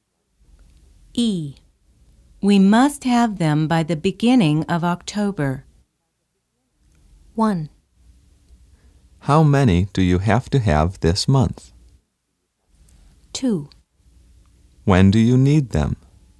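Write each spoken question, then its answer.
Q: We must have them by the beginning of October.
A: 2: When do you need them?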